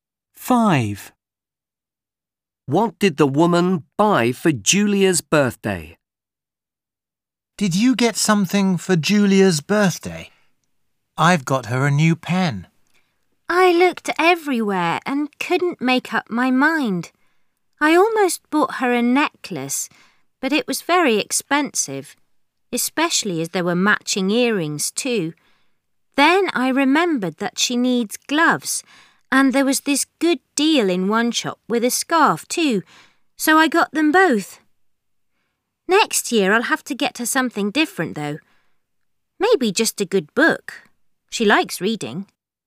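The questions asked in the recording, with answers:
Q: What did the woman buy for Julia's birthday?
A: Gloves and a scarf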